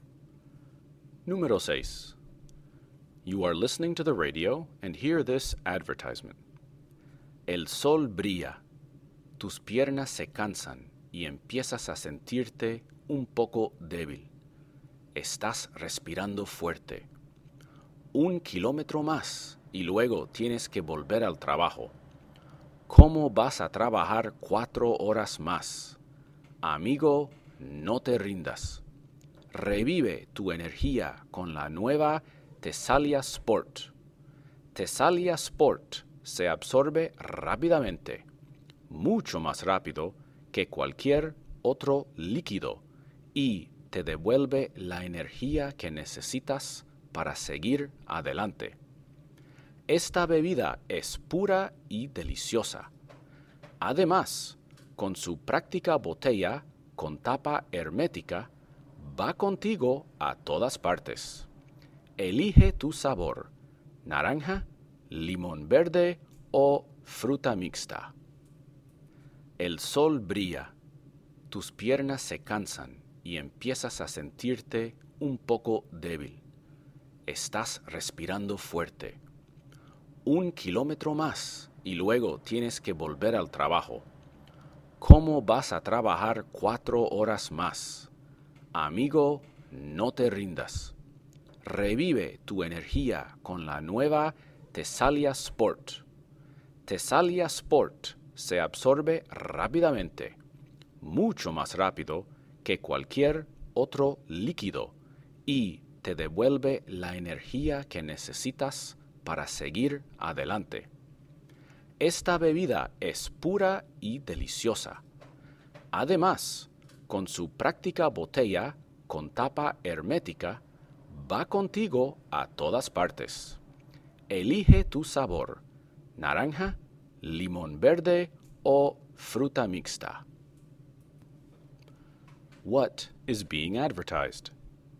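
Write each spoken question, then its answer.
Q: What is being advertised?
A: A sports drink (Tesalia Sport)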